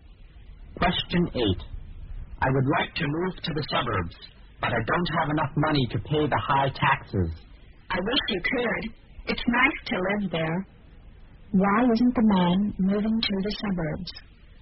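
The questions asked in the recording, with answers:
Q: Why isn't the man moving to the suburbs?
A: He doesn't have enough money to pay the high taxes.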